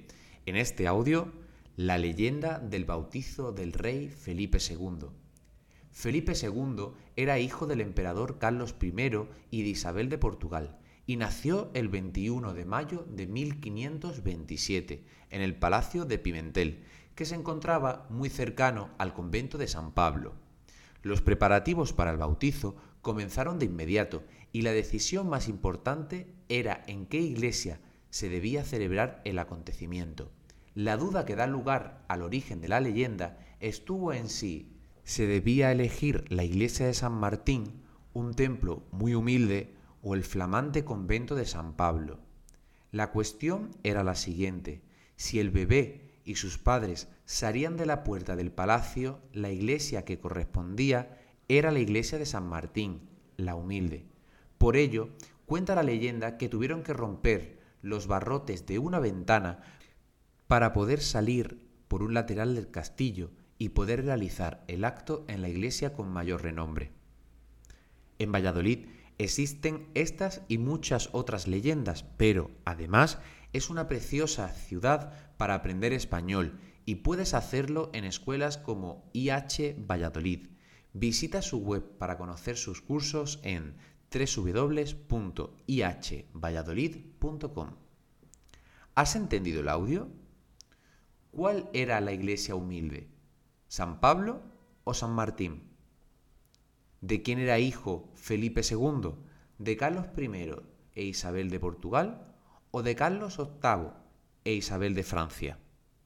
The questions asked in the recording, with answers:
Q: ¿Cuál era la iglesia humilde?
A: la iglesia humilde era la de San Martín

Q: ¿De quién era hijo Felipe II?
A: era hijo de Carlos I e Isabel de Portugal